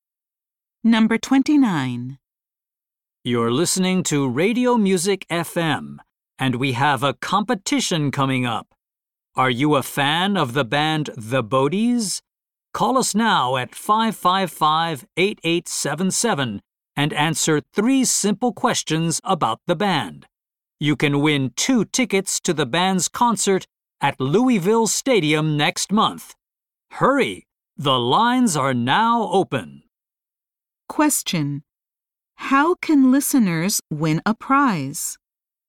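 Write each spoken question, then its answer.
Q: How can listeners win a prize?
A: By calling and answering 3 questions about the band.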